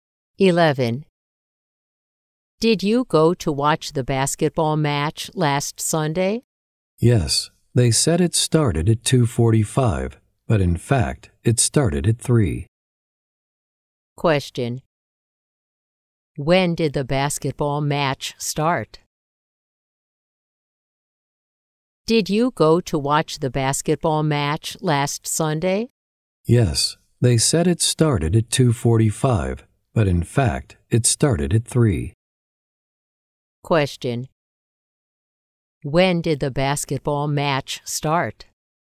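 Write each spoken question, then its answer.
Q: When did the basketball match start?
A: At 3 o'clock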